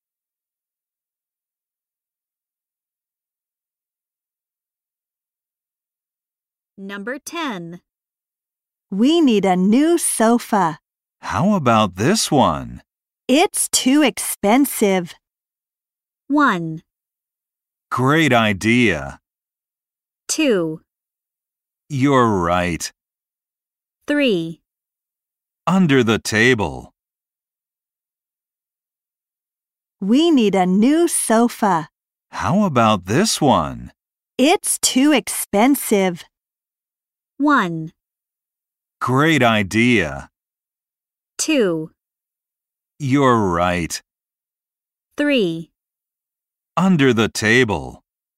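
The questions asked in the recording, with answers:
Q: It's too expensive.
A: 2: You're right.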